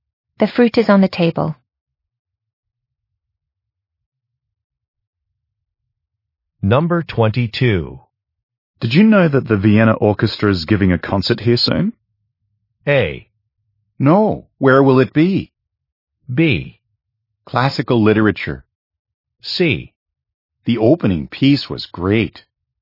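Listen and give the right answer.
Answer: A: No. Where will it be?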